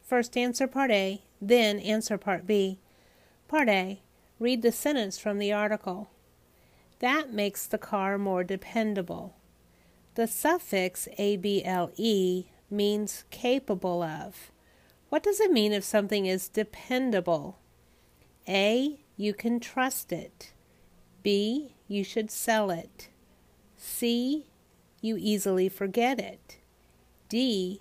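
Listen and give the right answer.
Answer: A: You can trust it.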